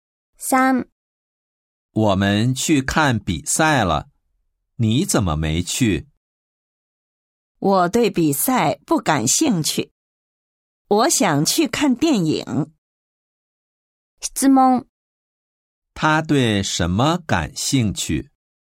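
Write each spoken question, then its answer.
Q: 他对什么感兴趣?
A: 看电影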